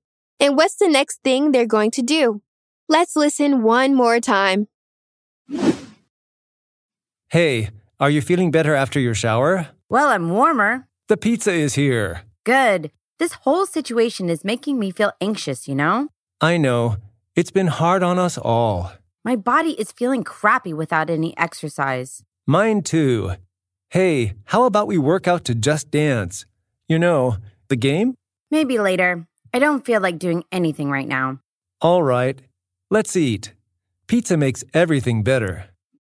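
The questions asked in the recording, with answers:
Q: And what's the next thing they're going to do?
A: Eat pizza.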